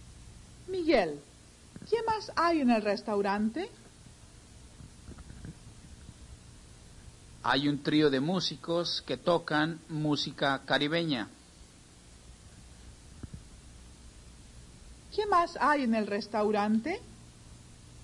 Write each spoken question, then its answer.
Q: ¿Qué más hay en el restaurante?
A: Hay un trío de músicos que toca música caribeña.